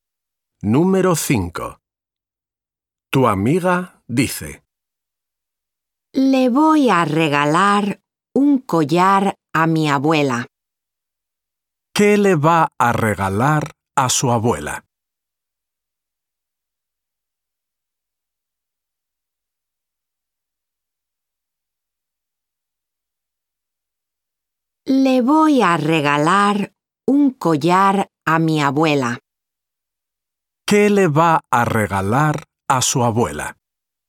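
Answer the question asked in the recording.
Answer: Un collar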